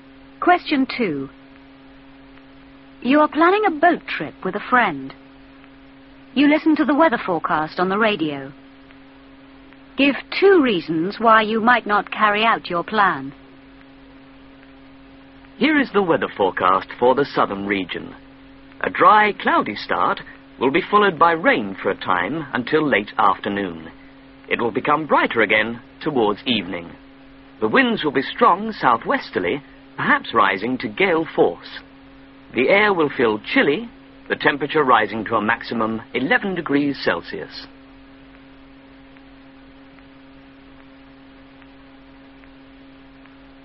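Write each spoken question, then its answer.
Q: Give 2 reasons why you might not carry out your plan.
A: Rain; strong winds, perhaps gale force (also chilly)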